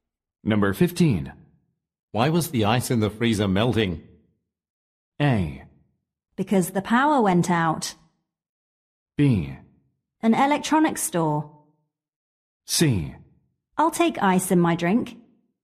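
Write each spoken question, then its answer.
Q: Why was the ice in the freezer melting?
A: A: Because the power went out.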